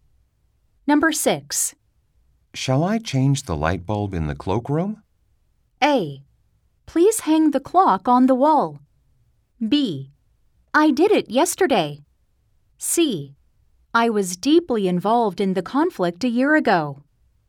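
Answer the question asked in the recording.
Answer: B: I did it yesterday.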